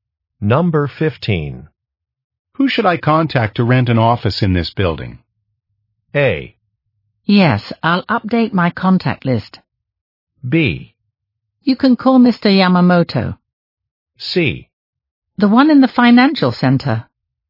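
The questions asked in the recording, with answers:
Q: Who should I contact to rent an office in this building?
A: B: You can call Mr. Yamamoto.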